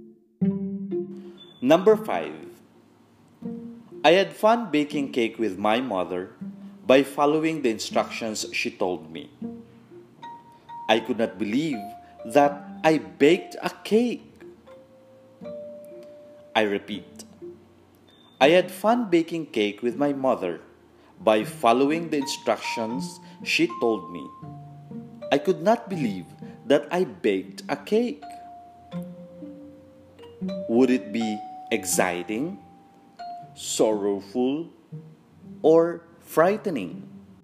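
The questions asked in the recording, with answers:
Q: Would it be exciting, sorrowful, or frightening.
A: exciting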